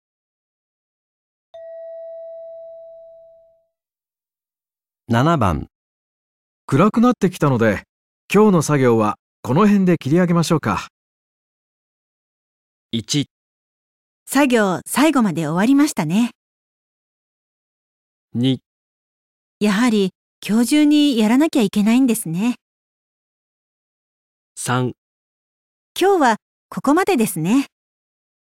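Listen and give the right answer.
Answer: 今日はここまでですね

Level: N2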